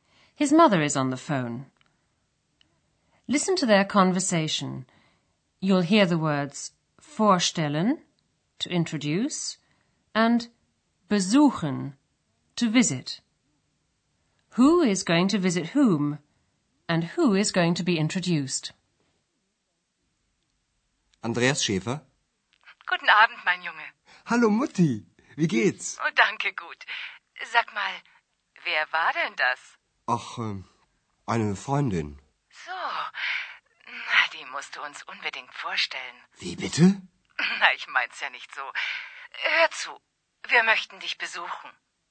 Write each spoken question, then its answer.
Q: Who is going to visit whom?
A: Andreas's mother says she'd like to come and visit him in Aachen

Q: And who is going to be introduced?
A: and she'd also like to be introduced to X.